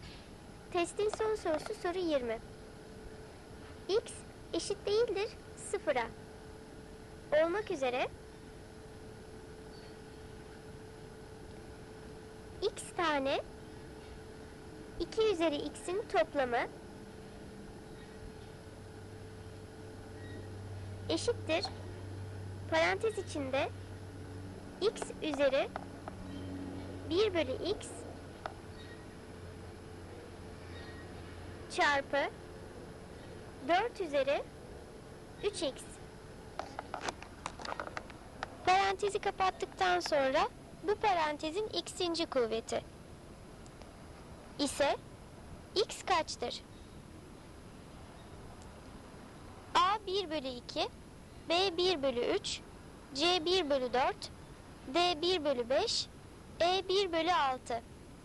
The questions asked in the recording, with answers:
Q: Parantezi kapattıktan sonra bu parantezin x'inci kuvveti ise x kaçtır?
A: Doğru cevap E 1 bölü 6.